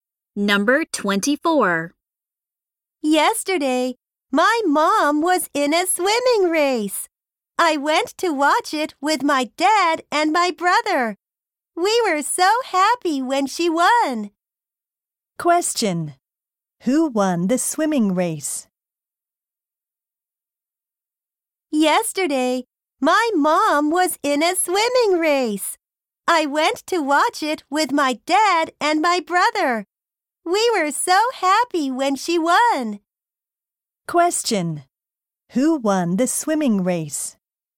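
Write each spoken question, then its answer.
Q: Who won the swimming race?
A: The speaker's mom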